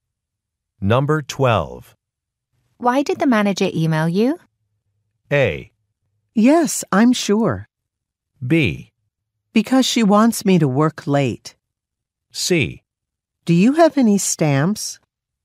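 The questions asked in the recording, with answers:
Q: Why did the manager email you?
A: B: Because she wants me to work late.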